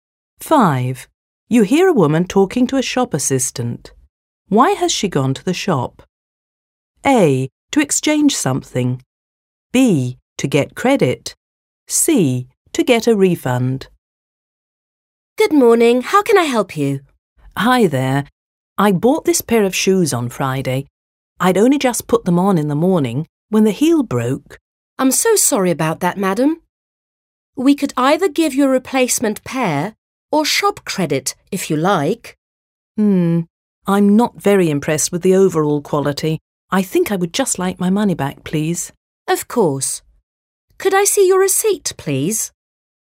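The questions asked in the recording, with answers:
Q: Why has she gone to the shop?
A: C: To get a refund.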